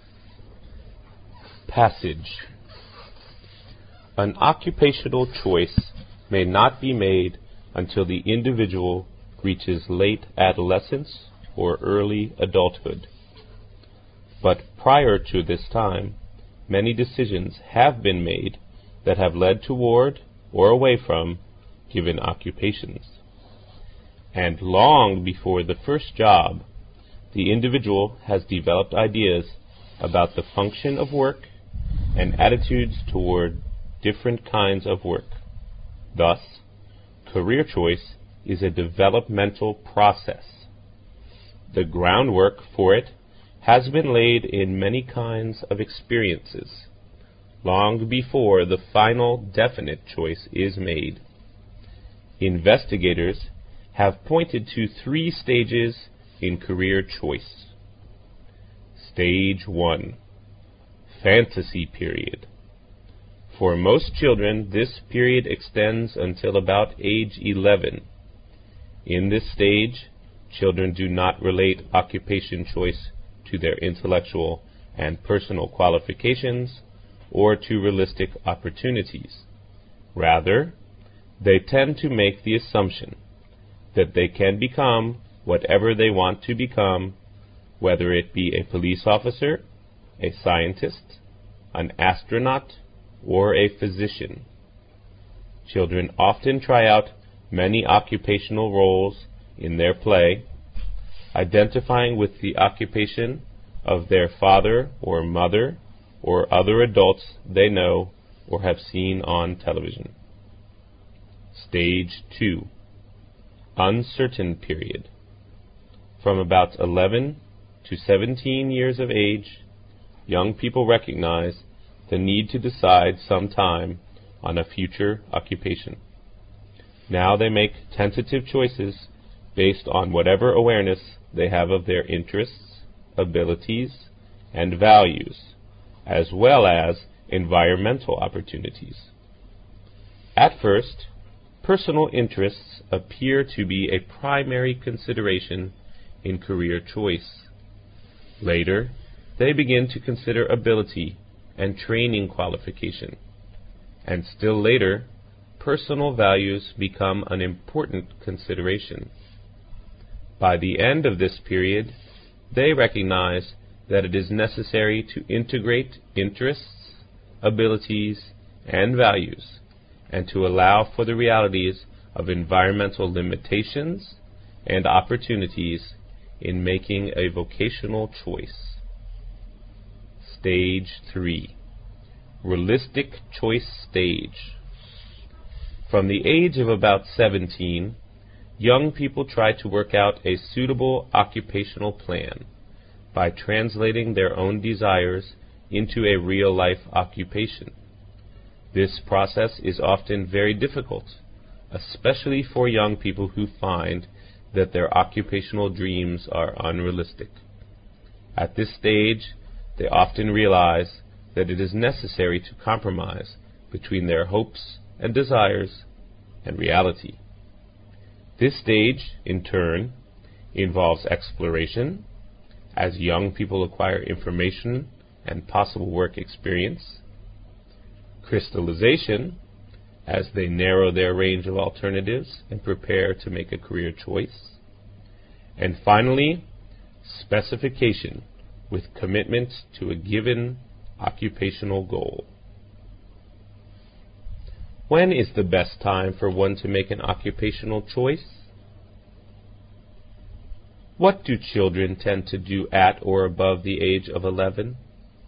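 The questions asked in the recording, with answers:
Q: When is the best time for one to make an occupational choice?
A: In late adolescence or early adulthood

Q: What do children tend to do at or above the age of 11?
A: Recognize the need to decide on a future occupation and make tentative choices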